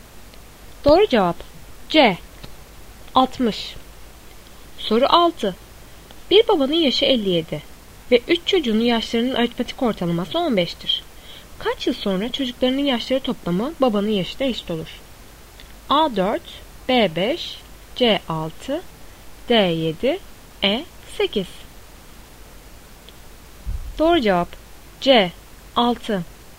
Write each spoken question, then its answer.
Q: Kaç yıl sonra çocuklarının yaşları toplamı babanın yaşına eşit olur?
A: Doğru cevap C 6.